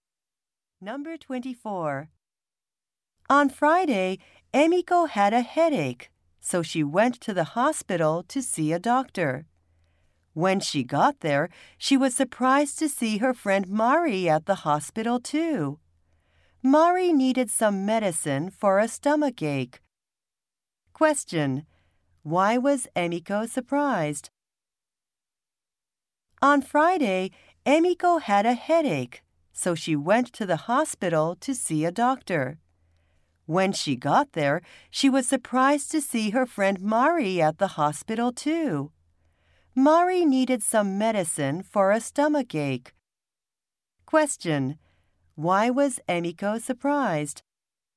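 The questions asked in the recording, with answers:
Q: Why was Emiko surprised?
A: She saw her friend Mari at the hospital.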